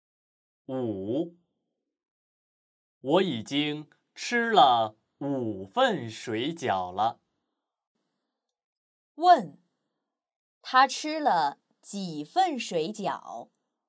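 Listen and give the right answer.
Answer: 五份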